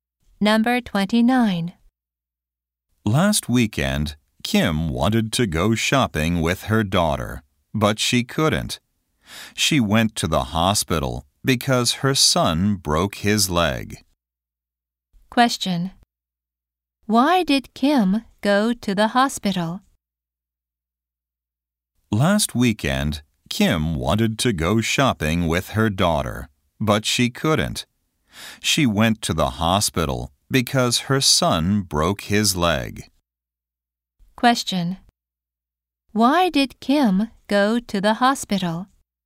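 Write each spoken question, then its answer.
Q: Question. Why did Kim go to the hospital?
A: Her son broke his leg.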